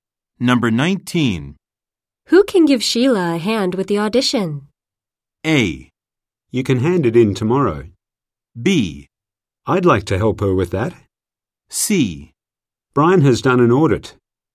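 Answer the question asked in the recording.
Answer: B: I'd like to help her with that.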